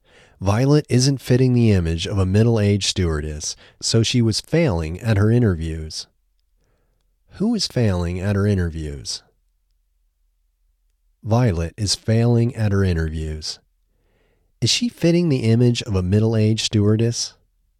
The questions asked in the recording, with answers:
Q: Is she fitting the image of a middle-aged stewardess?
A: No, she isn't fitting the image of a middle-aged stewardess.